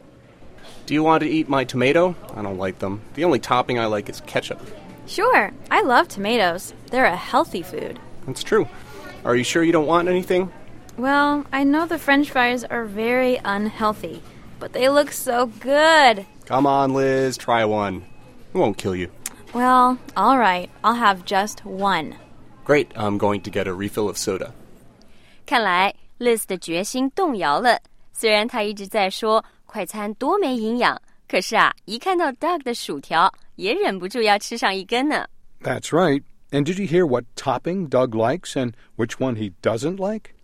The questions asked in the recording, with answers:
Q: And did you hear what topping Doug likes and which one he doesn't like?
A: Doug 说在汉堡的所有佐料里啊,他只喜欢 ketchup, 番茄酱,还说他不爱吃番茄。